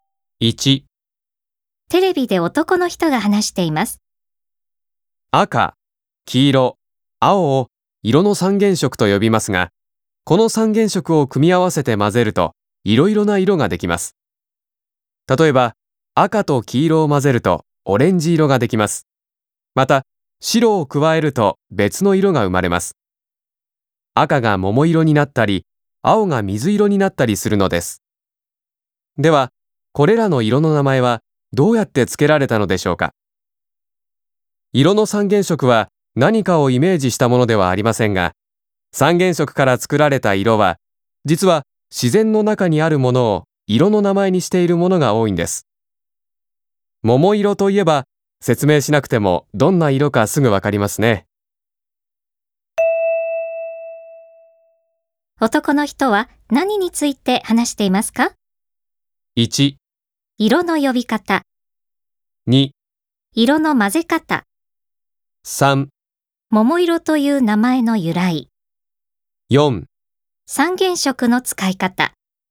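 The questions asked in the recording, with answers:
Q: 男の人は何について話していますか?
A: 1: 色の呼び方。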